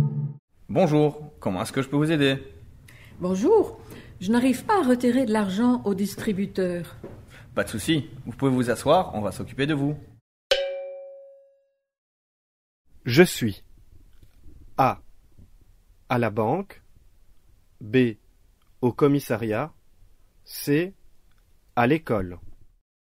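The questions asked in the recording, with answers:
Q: Je suis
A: A: À la banque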